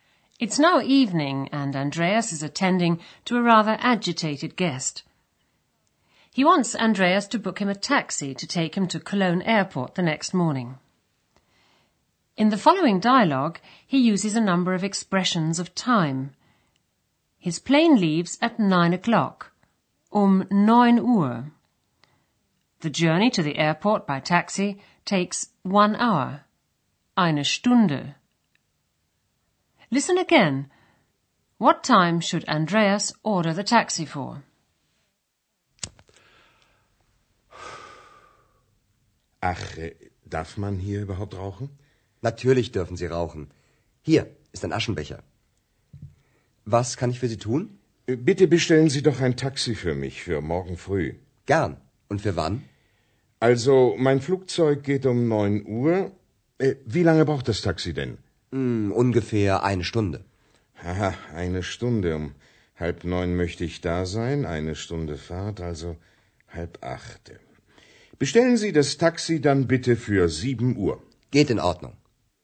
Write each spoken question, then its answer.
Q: What time should Andreas order the taxi for?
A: Andreas has to order the taxi for 7 o'clock the next morning.